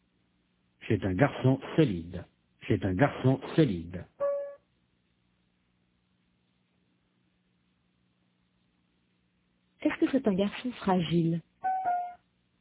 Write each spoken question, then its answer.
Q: Est-ce que c'est un garçon fragile?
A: Non, c'est un garçon solide.